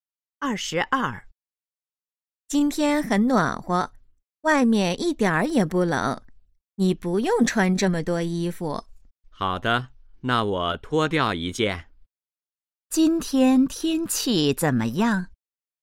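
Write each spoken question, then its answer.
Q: 今天天气怎么样?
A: 很暖和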